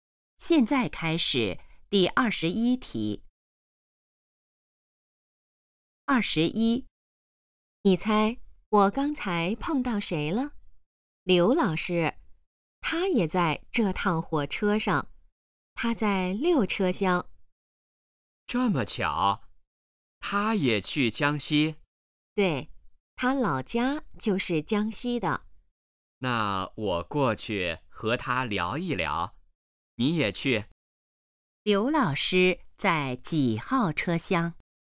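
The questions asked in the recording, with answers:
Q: 刘老师在几号车厢?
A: 六车厢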